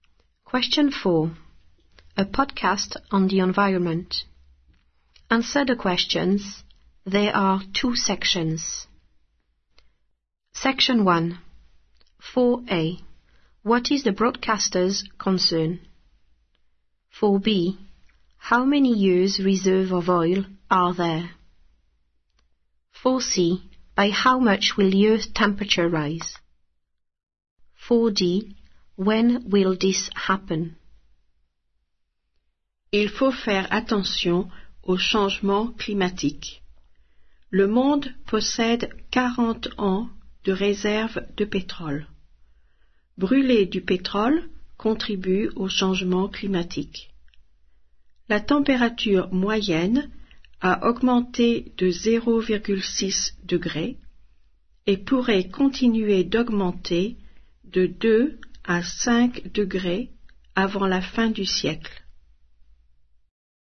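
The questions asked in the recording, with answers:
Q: What is the broadcaster's concern?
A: Climate change

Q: How many years reserve of oil are there?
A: 40 years

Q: By how much will the Earth temperature rise?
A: 2 to 5 degrees

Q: When will this happen?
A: Before the end of the century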